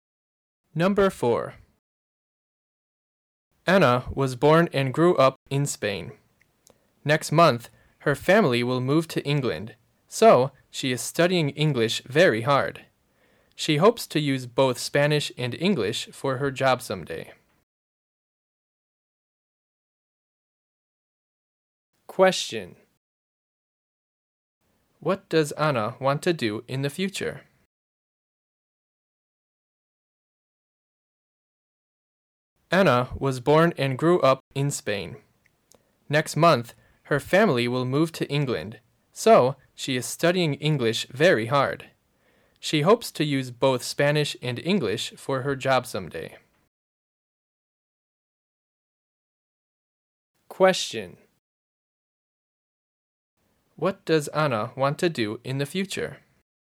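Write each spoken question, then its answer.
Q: What does Anna want to do in the future?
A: Use both Spanish and English for her job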